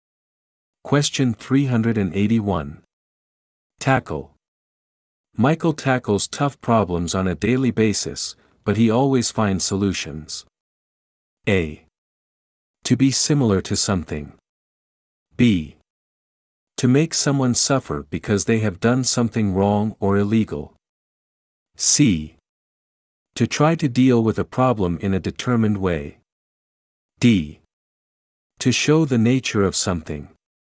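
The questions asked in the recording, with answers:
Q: Tackle. Michael tackles tough problems on a daily basis, but he always finds solutions.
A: C: To try to deal with a problem in a determined way.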